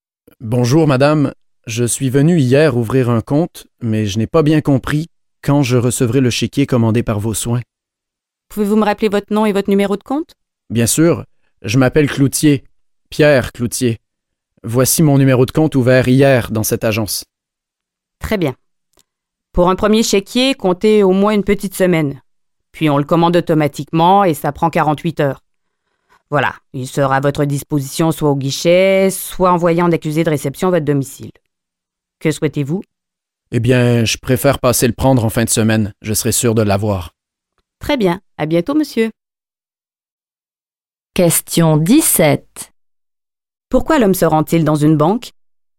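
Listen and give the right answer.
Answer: Pour savoir quand il recevra son chéquier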